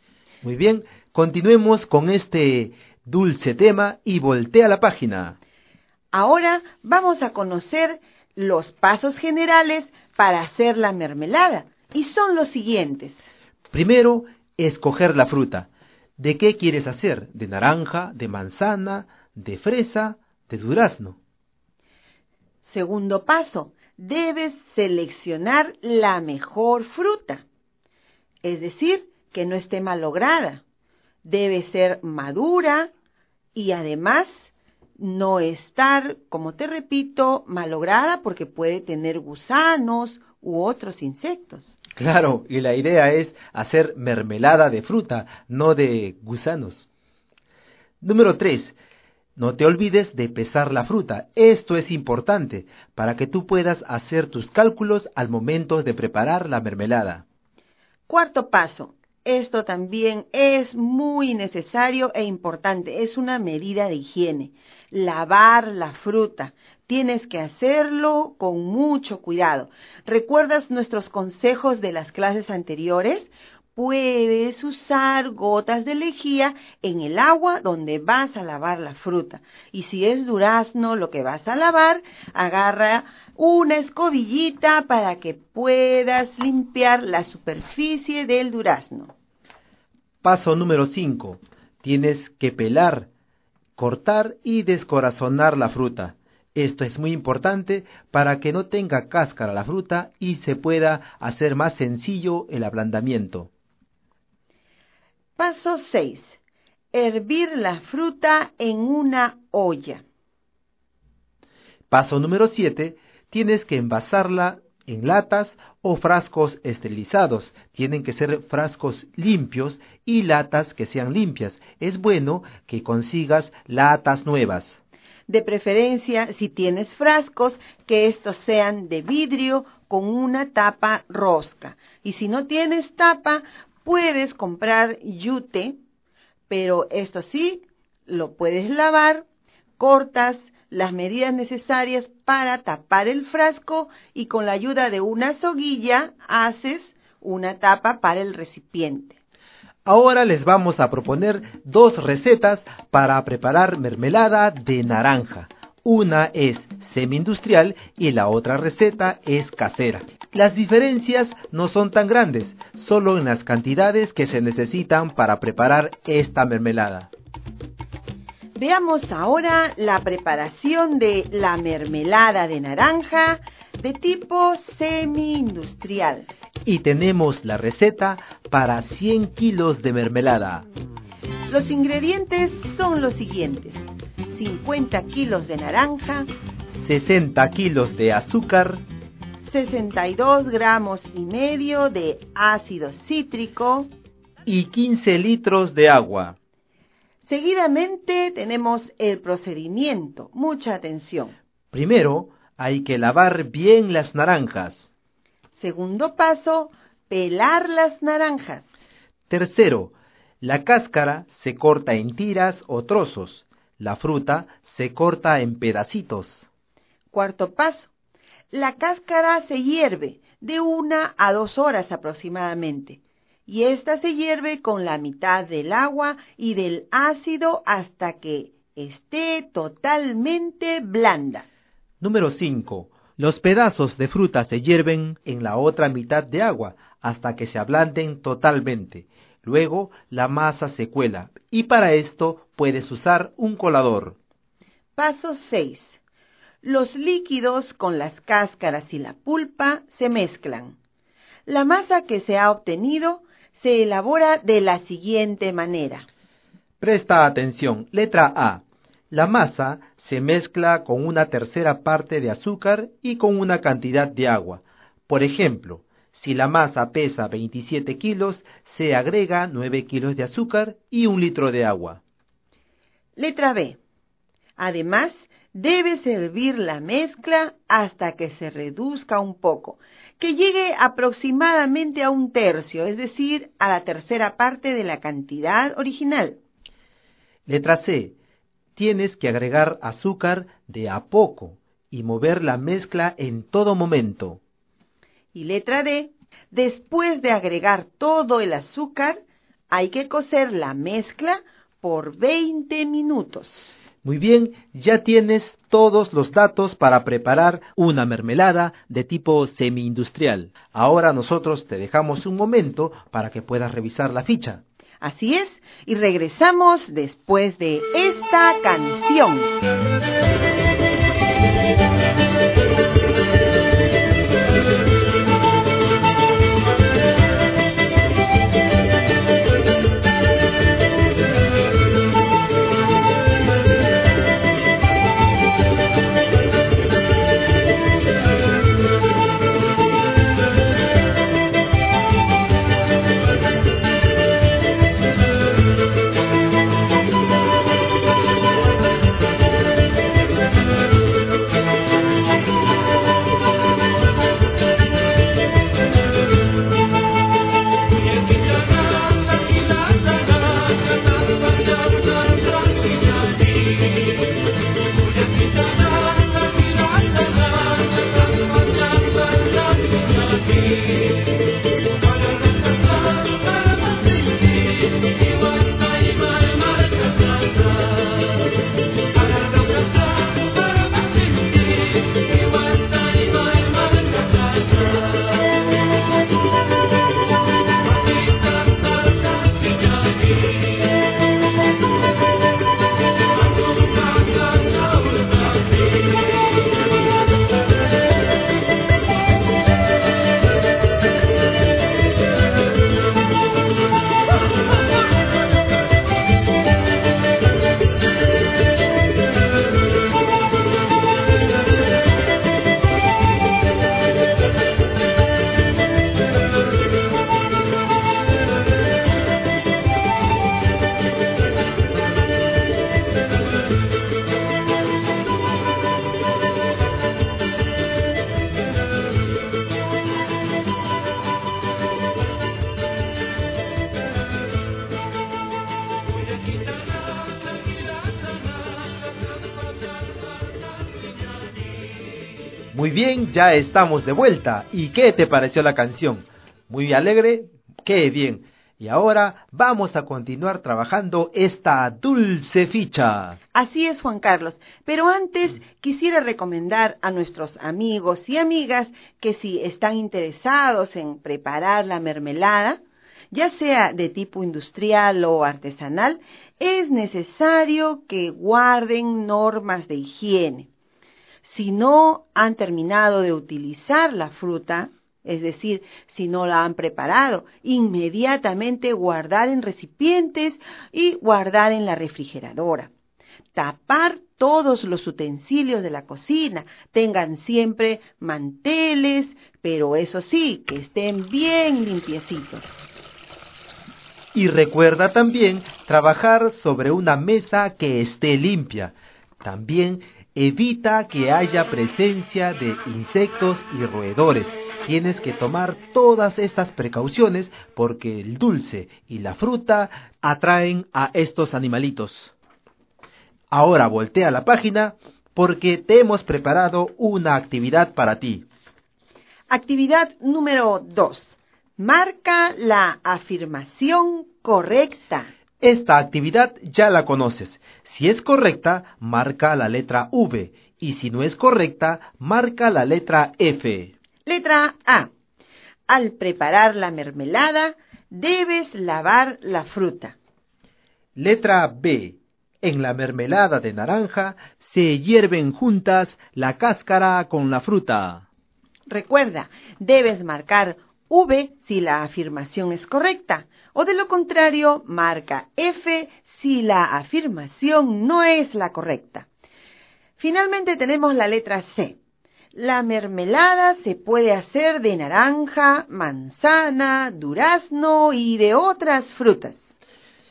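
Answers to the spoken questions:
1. V (verdadero)
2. F (falso)
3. V (verdadero)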